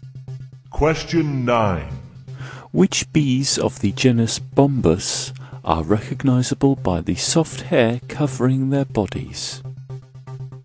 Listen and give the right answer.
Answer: bees of the genus Bombus are better known as bumblebees